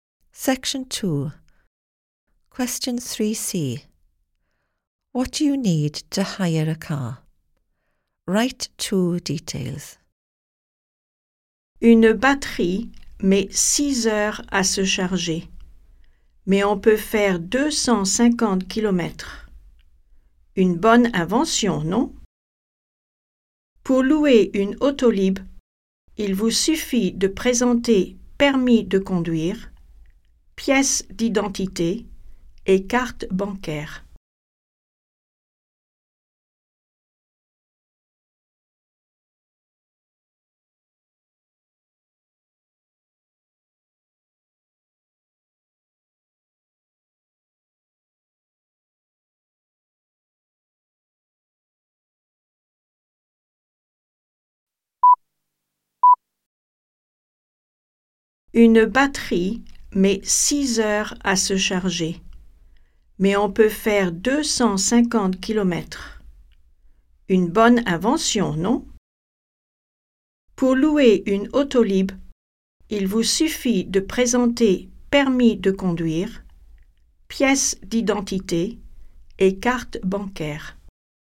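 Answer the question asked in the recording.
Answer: Driving licence, ID, bank card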